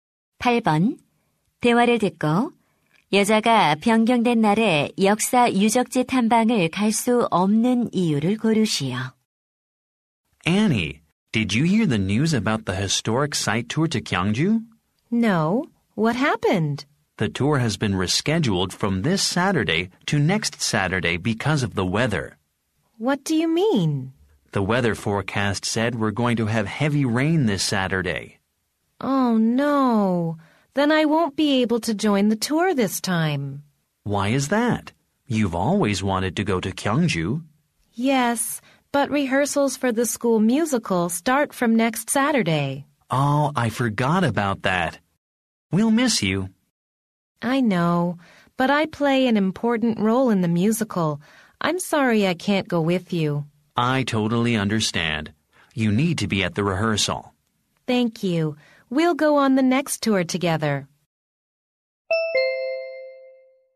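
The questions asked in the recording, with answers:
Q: 대화를 듣고 여자가 변경된 날에 역사 유적지 탐방을 갈 수 없는 이유를 고르시오.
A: 학교 뮤지컬 리허설에 참석해야 해서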